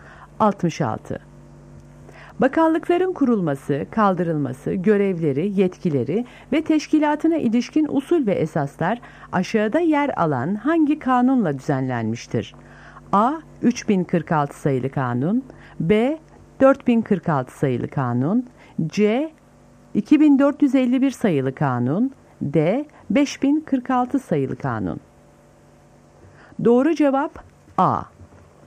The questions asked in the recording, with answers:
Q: Bakanlıkların kurulması, kaldırılması, görevleri, yetkileri ve teşkilatına ilişkin usul ve esaslar aşağıda yer alan hangi kanunla düzenlenmiştir?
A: Doğru cevap A.